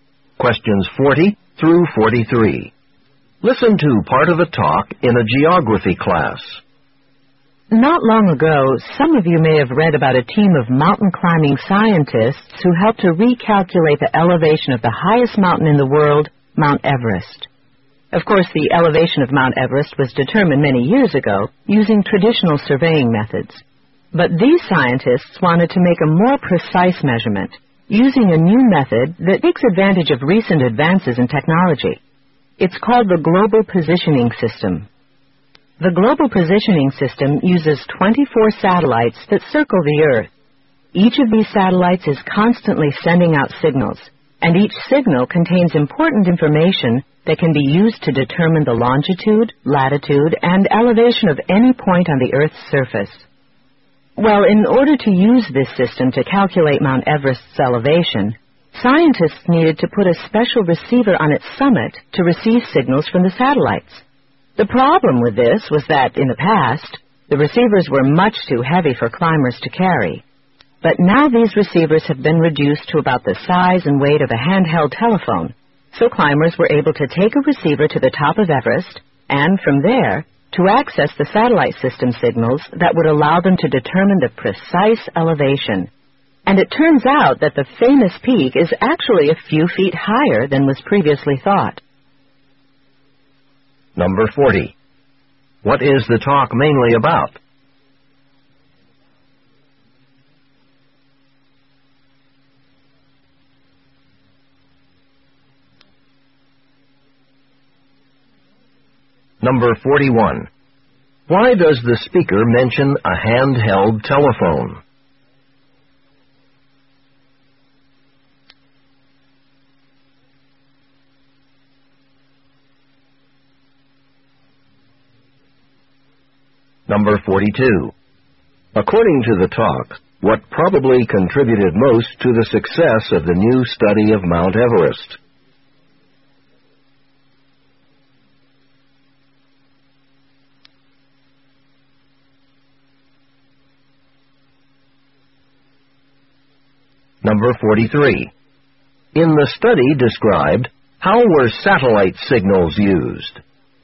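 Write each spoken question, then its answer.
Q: What is the talk mainly about?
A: Using the Global Positioning System to remeasure the elevation of Mount Everest

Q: Why does the speaker mention a handheld telephone?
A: To show how small and light the receivers have become

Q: According to the talk, what probably contributed most to the success of the new study of Mount Everest?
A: Lighter, smaller receivers that climbers could carry to the summit

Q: In the study described, how were satellite signals used?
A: To determine the precise elevation of Mount Everest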